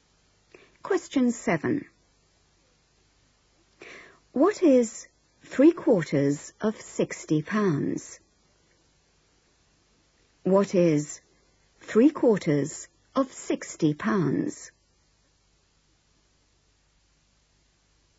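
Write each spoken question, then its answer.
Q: What is 3/4 of 60 pounds?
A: £45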